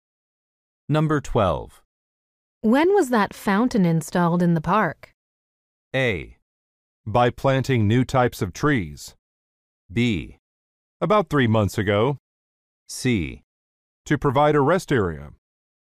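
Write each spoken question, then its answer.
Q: When was that fountain installed in the park?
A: B: About 3 months ago.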